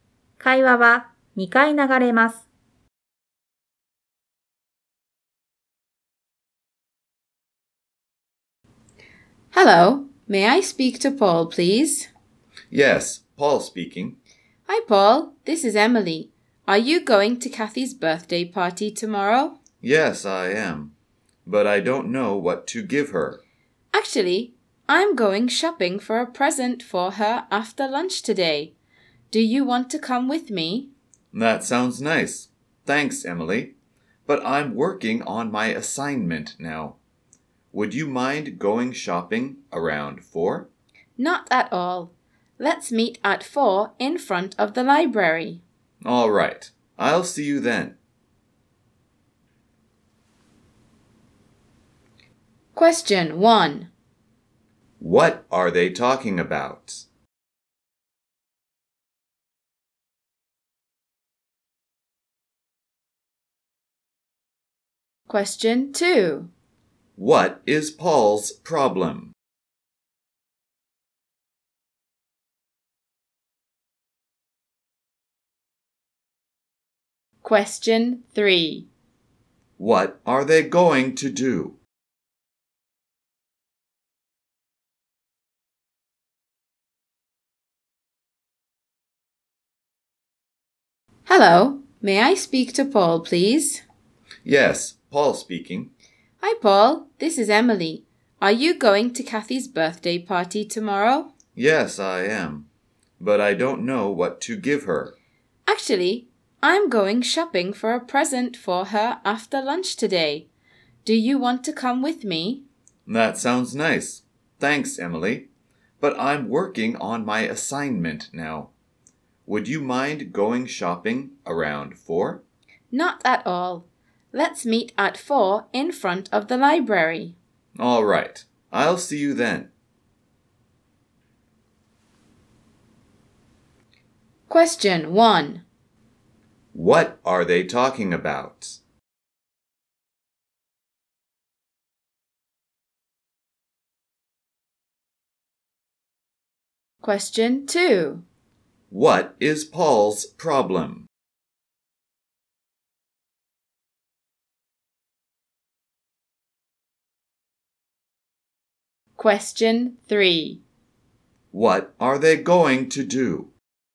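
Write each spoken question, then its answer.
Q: What are they talking about?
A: Shopping for Kathy's birthday present

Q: What is Paul's problem?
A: He doesn't know what to give Kathy

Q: What are they going to do?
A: Meet at 4 in front of the library and go shopping for a present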